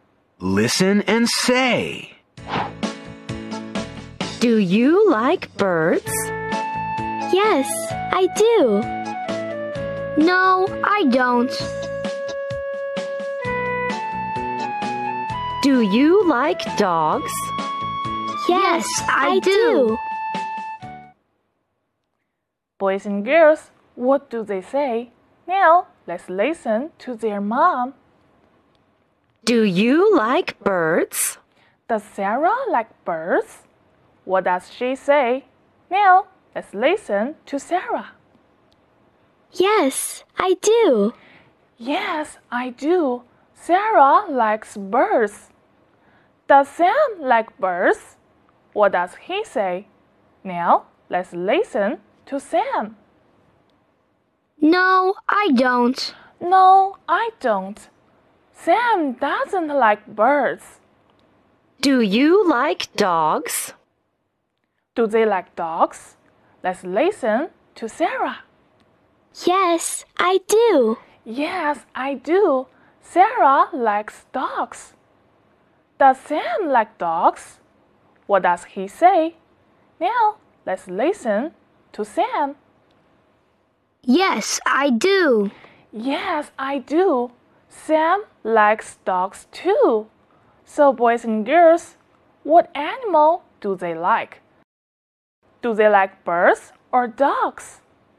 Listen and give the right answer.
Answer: They like dogs.